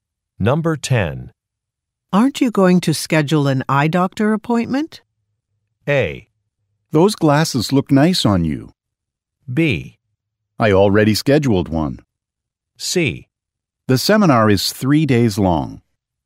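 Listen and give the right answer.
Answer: B: I already scheduled one.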